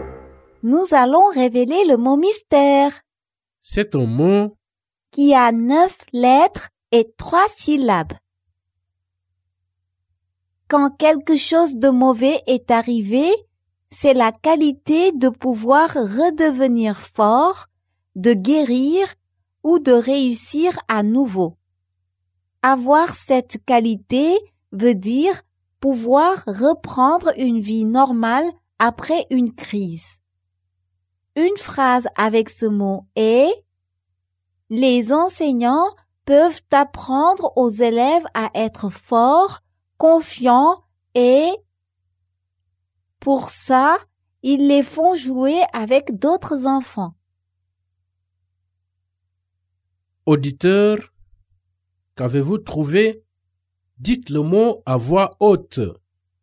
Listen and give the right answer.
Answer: Le mot mystère est résilient.